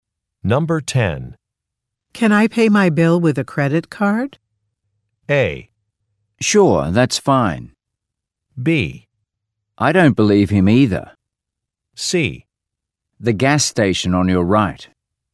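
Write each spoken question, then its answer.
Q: Can I pay my bill with a credit card?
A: A: Sure, that's fine.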